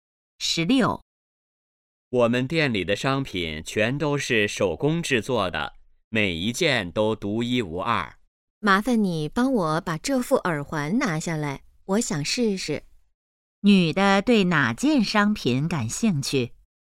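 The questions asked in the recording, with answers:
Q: 女的对哪件商品感兴趣?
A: 耳环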